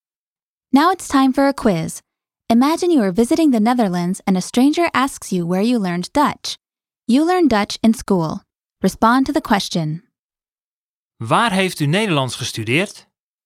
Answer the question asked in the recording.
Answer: Ik heb het op school geleerd.